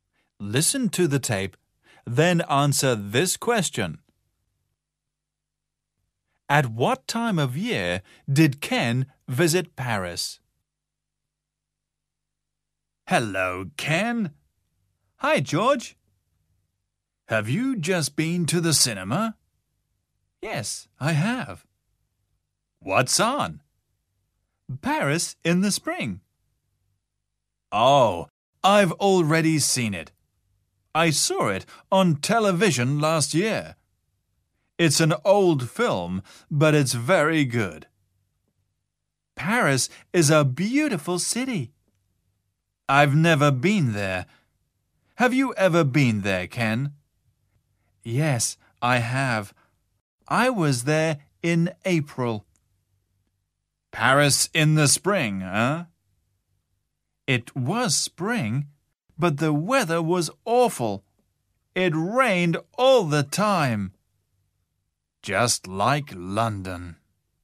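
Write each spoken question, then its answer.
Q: At what time of year did Ken visit Paris?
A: In the spring (in April)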